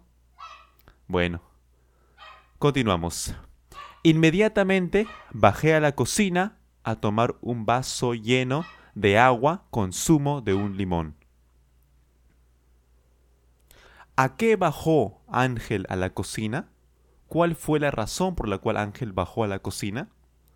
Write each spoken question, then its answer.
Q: ¿A qué bajó Ángel a la cocina?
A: Cierto, claro. Él bajó a tomar un vaso lleno de agua, con zumo de un limón.